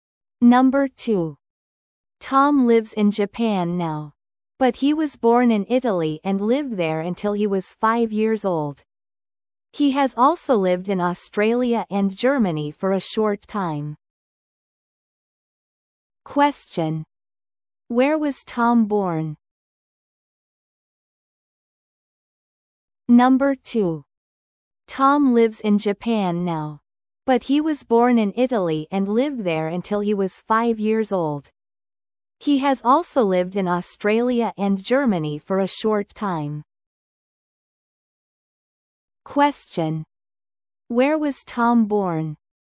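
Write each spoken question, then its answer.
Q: Where was Tom born?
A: In Italy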